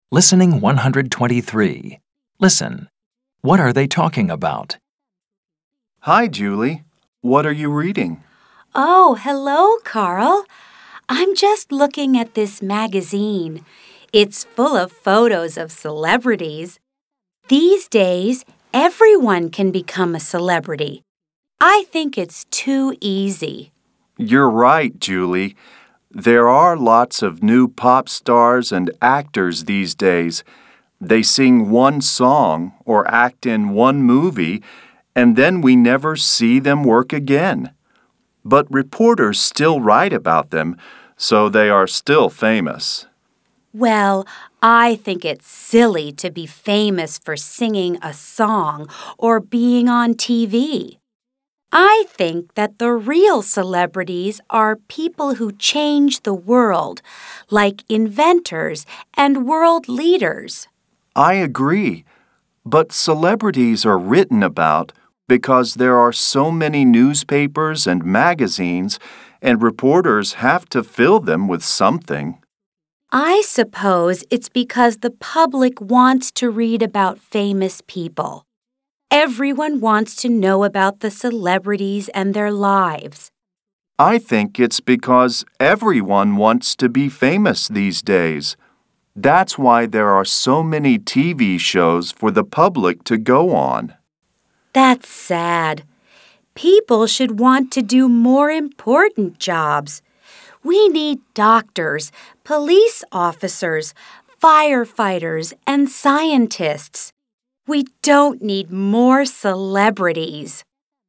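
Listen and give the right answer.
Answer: Celebrities and being famous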